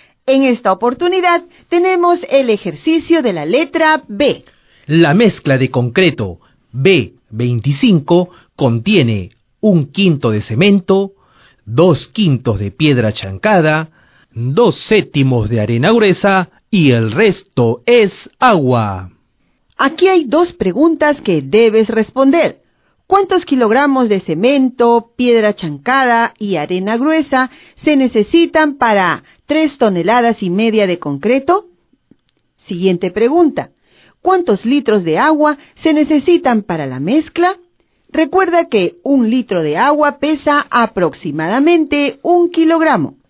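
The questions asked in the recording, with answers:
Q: ¿Cuántos kilogramos de cemento, piedra chancada y arena gruesa se necesitan para 3,5 toneladas de concreto?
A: 700 kg de cemento, 1400 kg de piedra chancada y 1000 kg de arena gruesa

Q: ¿Cuántos litros de agua se necesitan para la mezcla?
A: 400 litros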